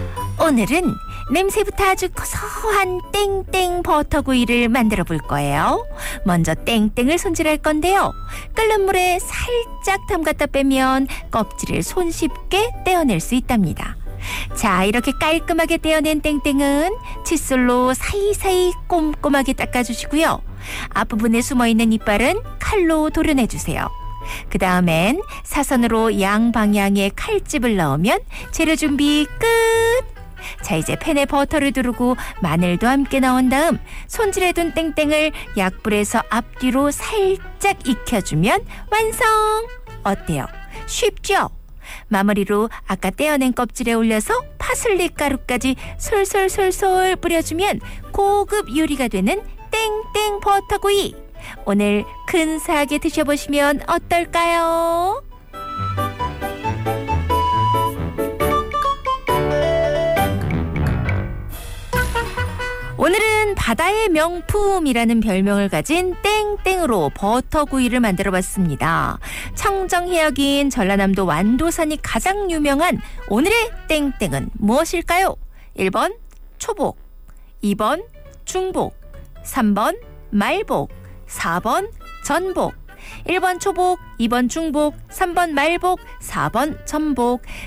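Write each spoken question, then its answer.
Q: 청정해역인 전라남도 완도산이 가장 유명한 오늘의 땡땡은 무엇일까요?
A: 4번: 전복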